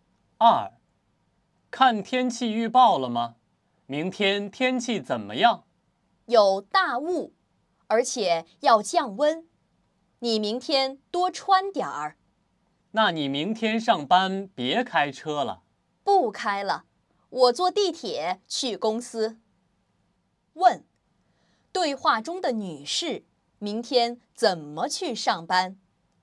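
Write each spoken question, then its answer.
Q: 对话中的女士明天怎么去上班?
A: 坐地铁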